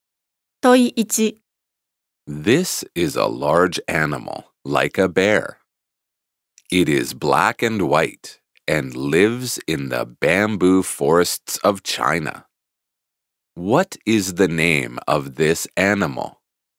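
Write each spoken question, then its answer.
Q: What is the name of this animal?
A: A panda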